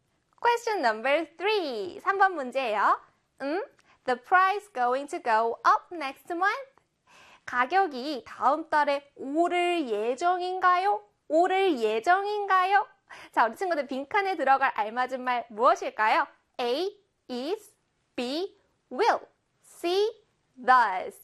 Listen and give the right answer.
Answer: 바로 A의 is입니다.